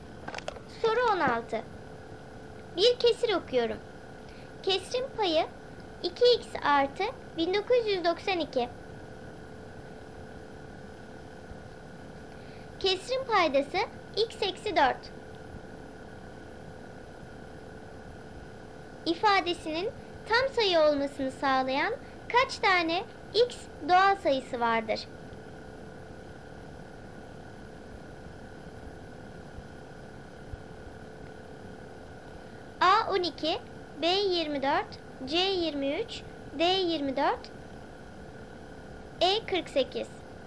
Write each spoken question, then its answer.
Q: İfadesinin tam sayı olmasını sağlayan kaç tane x doğal sayısı vardır?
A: Doğru cevap C 23.